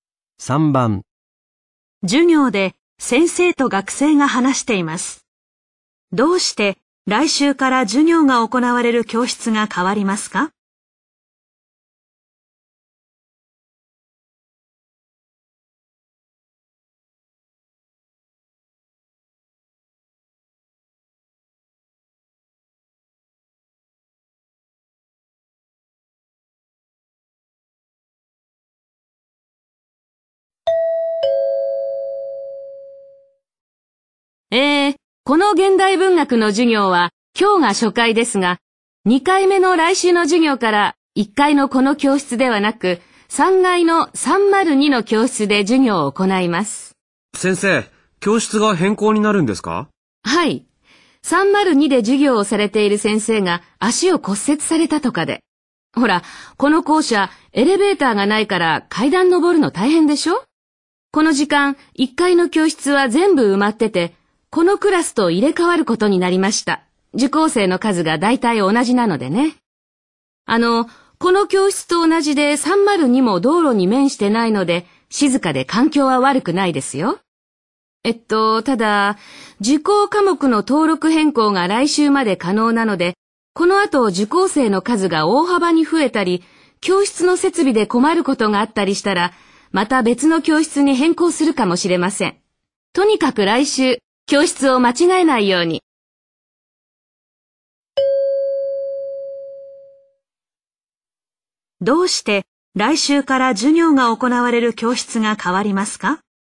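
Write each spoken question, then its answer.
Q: どうして来週から授業が行われる教室が変わりますか?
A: 302で授業をする先生が足を骨折し、1階の教室と入れ替わるから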